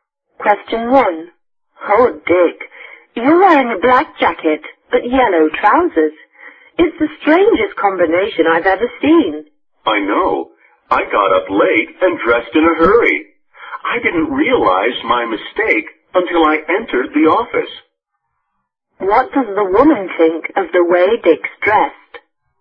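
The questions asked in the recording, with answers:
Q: What does the woman think of the way Dick's dressed?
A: She thinks it's a very strange combination.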